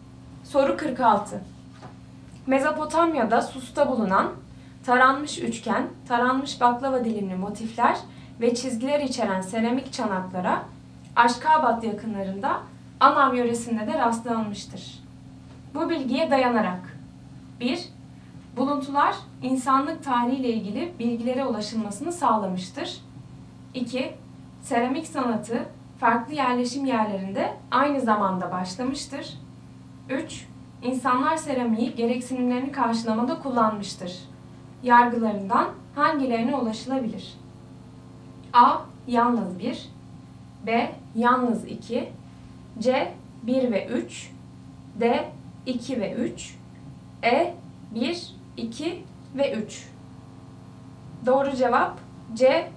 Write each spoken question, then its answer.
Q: Yargılarından hangilerine ulaşılabilir?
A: Doğru cevap C. 1 ve 3.